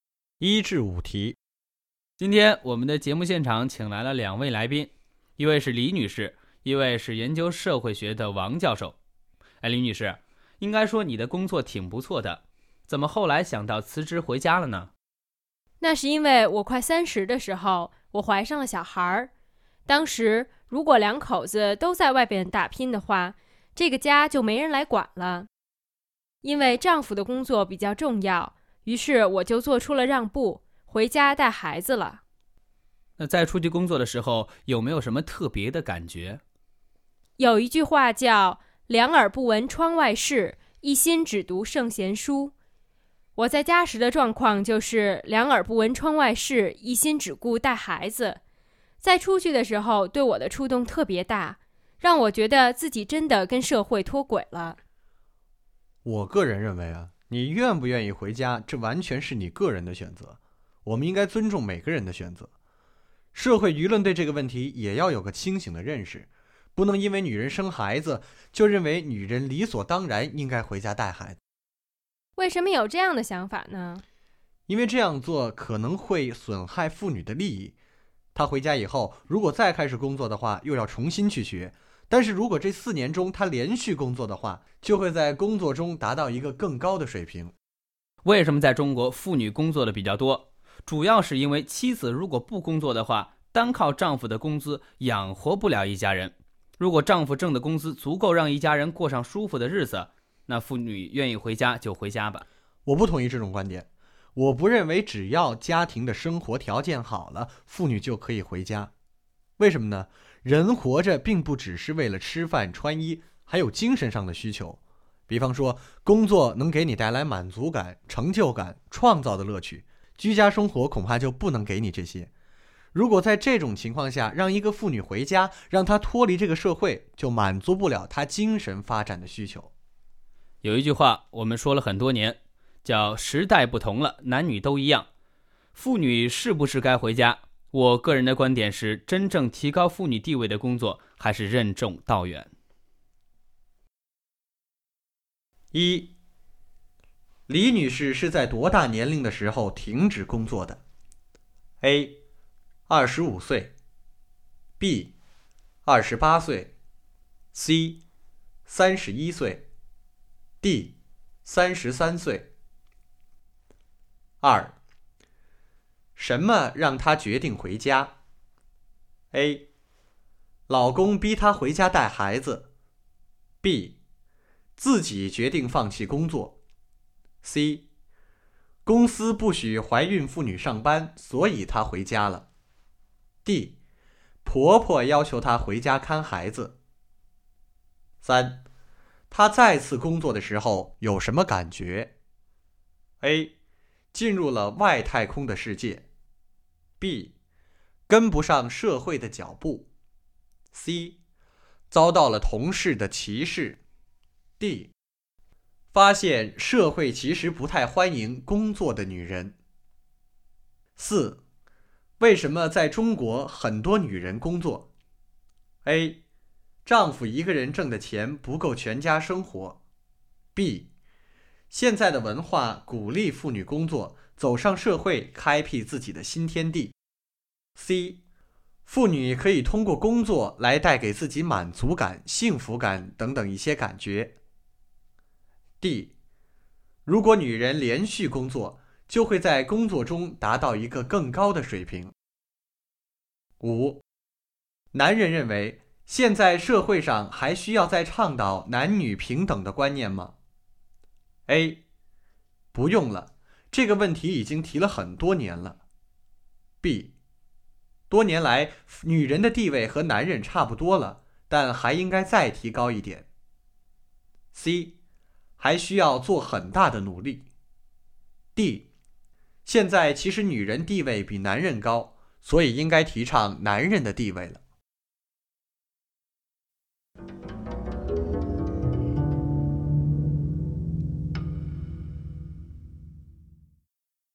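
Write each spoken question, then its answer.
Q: 什么让她决定回家?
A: B: 自己决定放弃工作

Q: 他再次工作的时候有什么感觉?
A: B: 跟不上社会的脚步

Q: 为什么在中国很多女人工作?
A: A: 丈夫一个人挣的钱不够全家生活

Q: 男人认为现在社会上还需要再倡导男女平等的观念吗?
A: C: 还需要做很大的努力。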